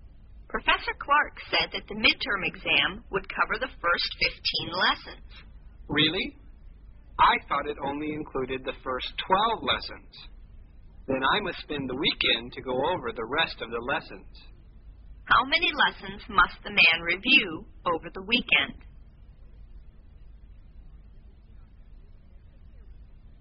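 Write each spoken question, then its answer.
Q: How many lessons must the man review over the weekend?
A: Three lessons (lessons 13 to 15)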